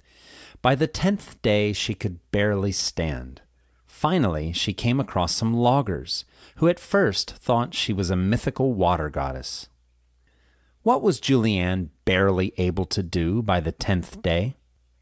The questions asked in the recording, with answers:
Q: What was Julianne barely able to do by the 10th day?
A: By the 10th day, she was barely able to stand.